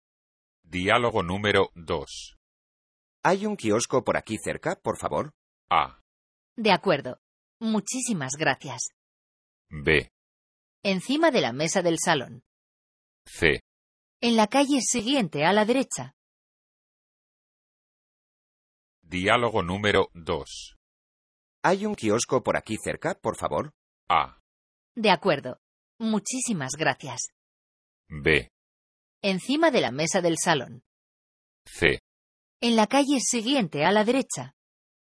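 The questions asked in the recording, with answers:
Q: ¿Hay un kiosco por aquí cerca, por favor?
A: C: En la calle siguiente, a la derecha.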